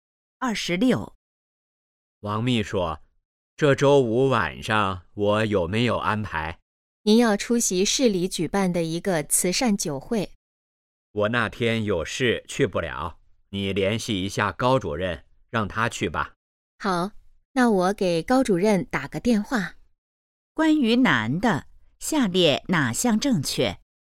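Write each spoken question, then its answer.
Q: 关于男的,下列哪项正确?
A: 周五去不了慈善酒会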